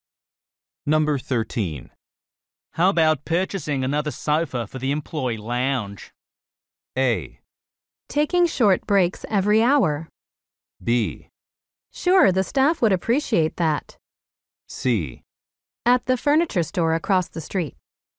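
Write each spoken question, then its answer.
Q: How about purchasing another sofa for the employee lounge?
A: B: Sure, the staff would appreciate that.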